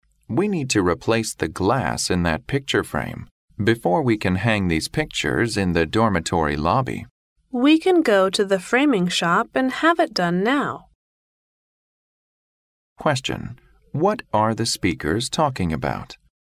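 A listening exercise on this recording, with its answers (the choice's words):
What are the speakers talking about?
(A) Hanging a picture.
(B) Framing a painting.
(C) Buying new glasses.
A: Framing a painting.

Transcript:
M: We need to replace the glass in that picture frame before we can hang these pictures in the dormitory lobby.
W: We can go to the framing shop and have it done now.
Q: What are the speakers talking about?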